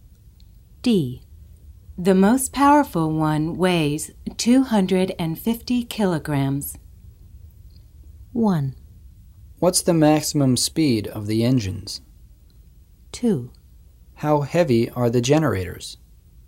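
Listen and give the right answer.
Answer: 2: How heavy are the generators?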